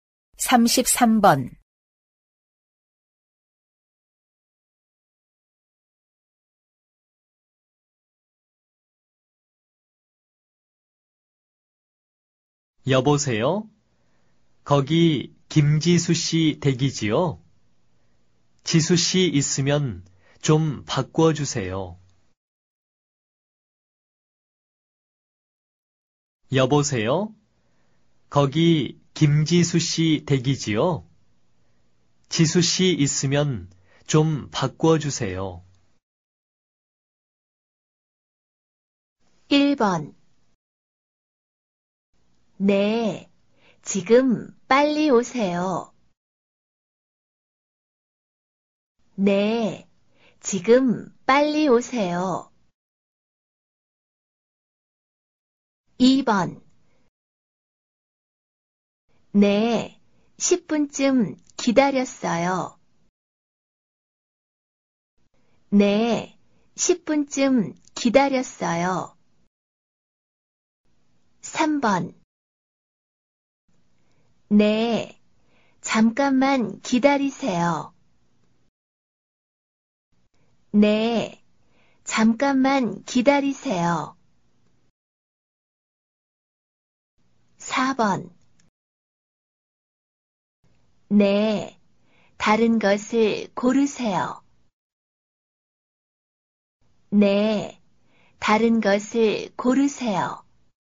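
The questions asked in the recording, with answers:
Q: 여보세요? 거기 김지수 씨 댁이지요? 지수 씨 있으면 좀 바꿔주세요.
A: 3: 네, 잠깐만 기다리세요.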